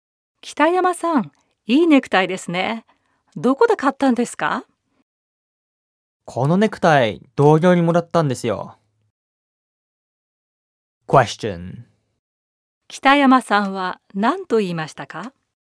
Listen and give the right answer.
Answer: 北山さんはネクタイを同僚にもらったと言いました。